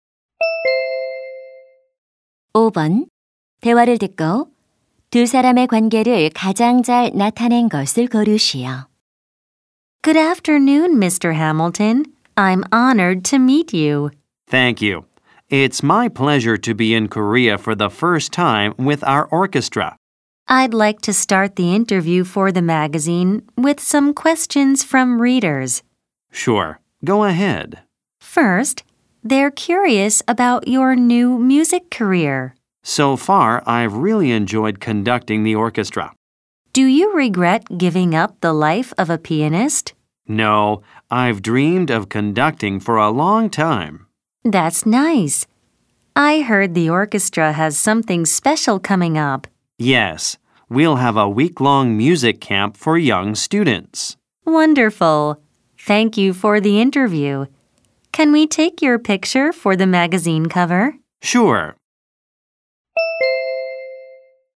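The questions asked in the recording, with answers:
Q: 대화를 듣고 두 사람의 관계를 가장 잘 나타낸 것을 고르시오.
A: 잡지 기자 - 오케스트라 지휘자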